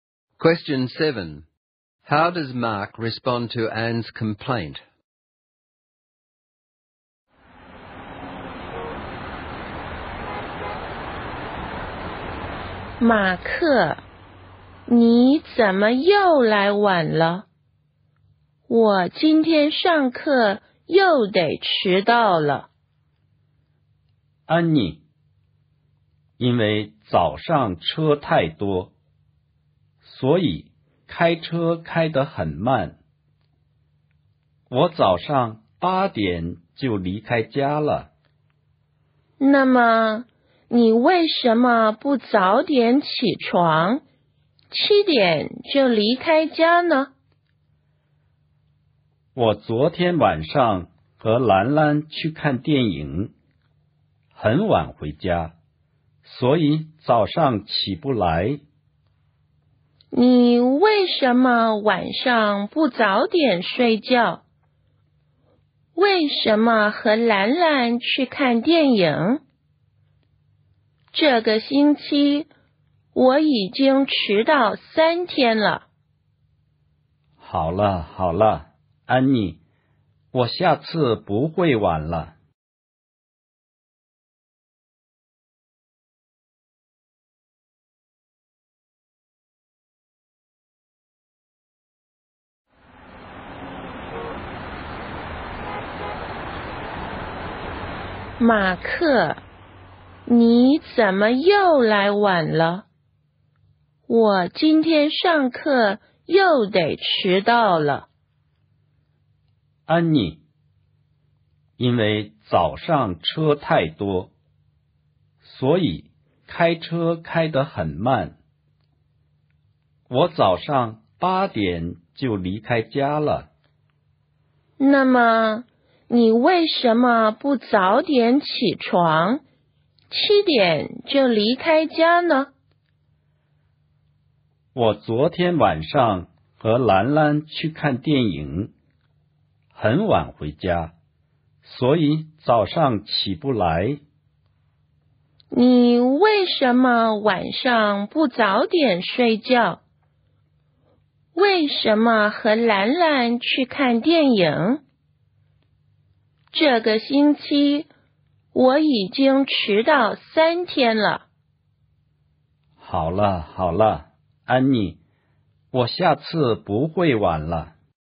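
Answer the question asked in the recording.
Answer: He gives excuses (heavy traffic, late movie) and then promises he won't be late next time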